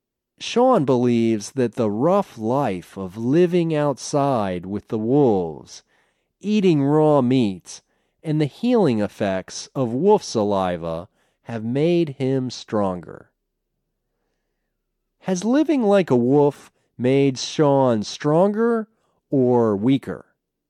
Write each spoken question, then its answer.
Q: Has living like a wolf made Sean stronger or weaker?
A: Living like a wolf has made Sean stronger.